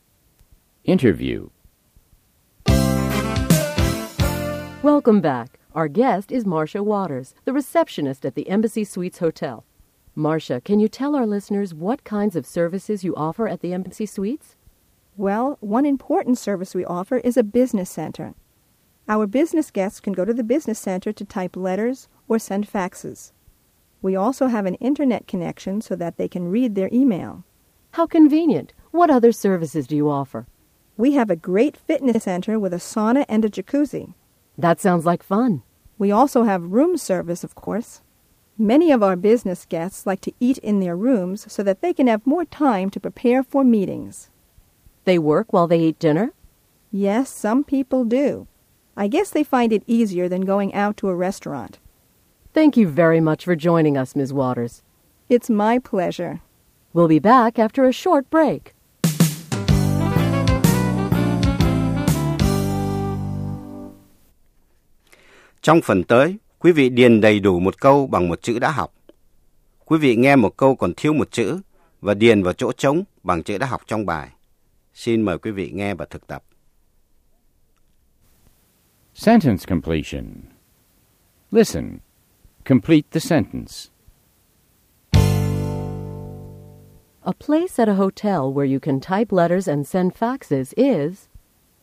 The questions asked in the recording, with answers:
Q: A place at a hotel where you can type letters and send faxes is...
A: A business center. It's a business center.